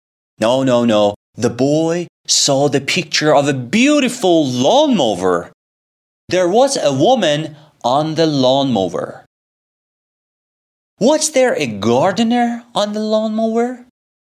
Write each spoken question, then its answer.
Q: Was there a gardener on the lawnmower?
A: No, there wasn't a gardener on the lawnmower.